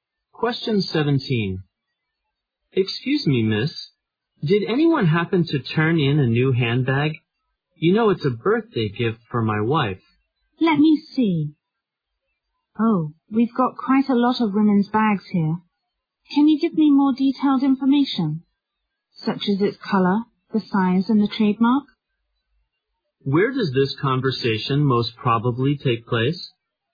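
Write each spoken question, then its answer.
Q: Where does this conversation most probably take place?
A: At a lost and found office.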